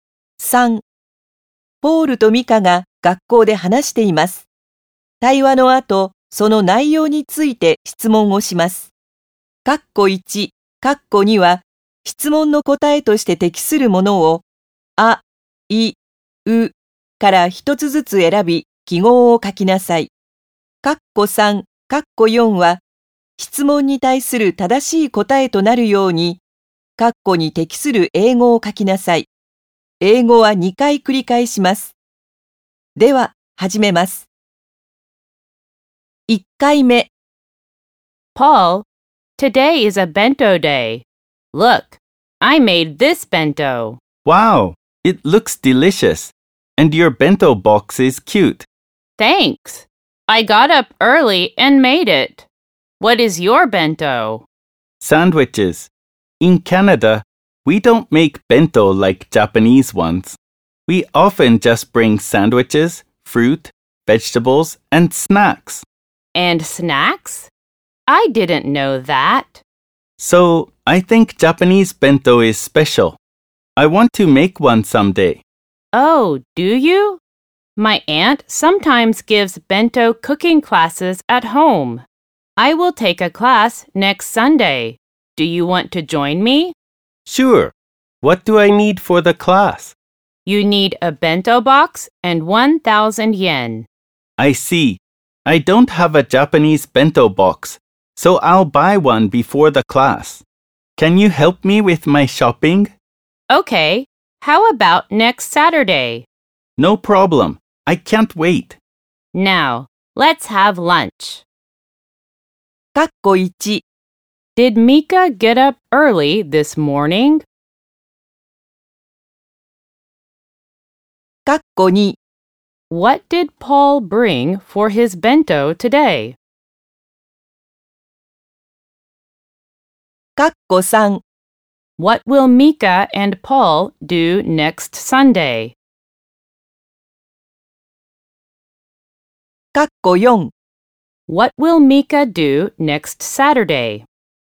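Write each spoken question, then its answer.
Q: Did Mika get up early this morning?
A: Yes, she did.

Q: What did Paul bring for his bento today?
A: Sandwiches

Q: What will Mika and Paul do next Sunday?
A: They will take a bento cooking class at Mika's aunt's home

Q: What will Mika do next Saturday?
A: She will help Paul shop for a bento box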